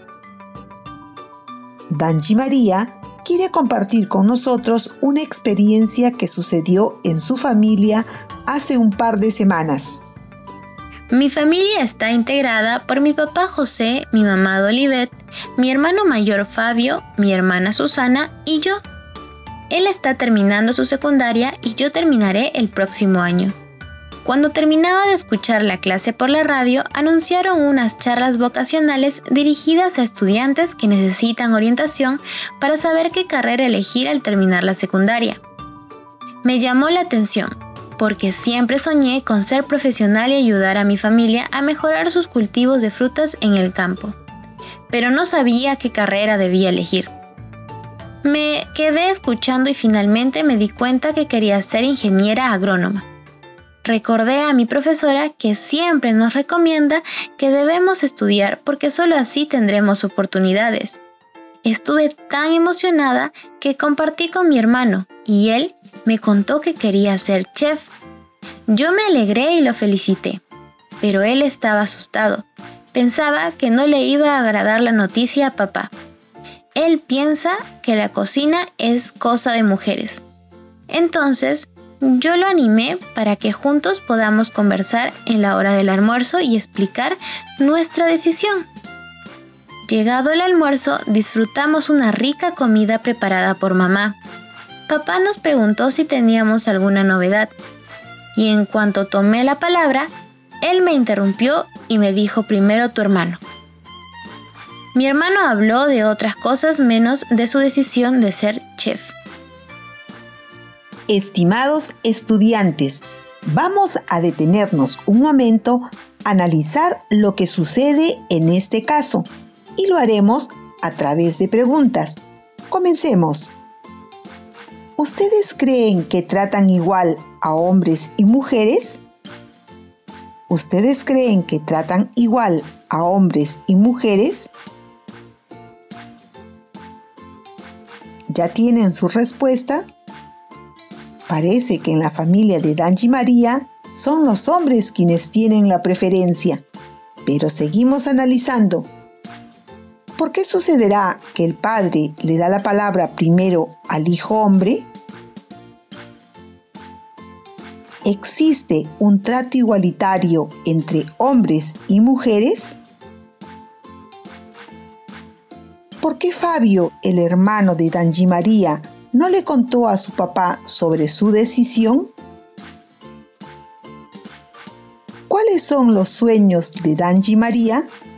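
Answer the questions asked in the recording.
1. Tenía miedo porque su papá piensa que la cocina es cosa de mujeres
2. Ser ingeniera agrónoma y ayudar a su familia a mejorar sus cultivos de frutas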